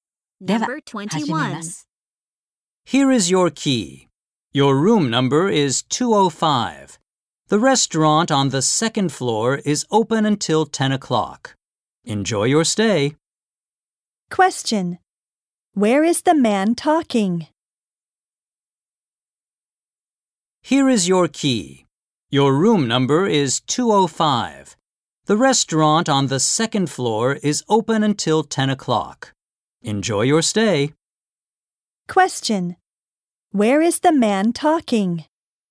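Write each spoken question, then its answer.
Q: Where is the man talking?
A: At a hotel.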